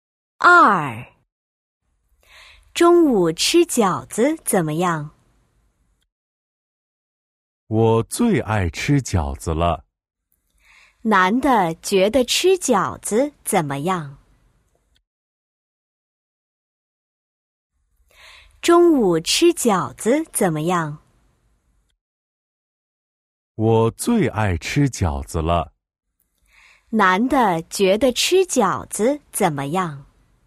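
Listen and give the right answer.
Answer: 最爱吃饺子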